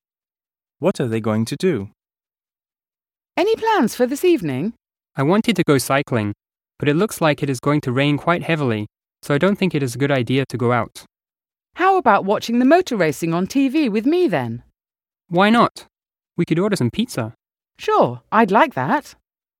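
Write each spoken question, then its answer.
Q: What are they going to do?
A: Watch motor racing on TV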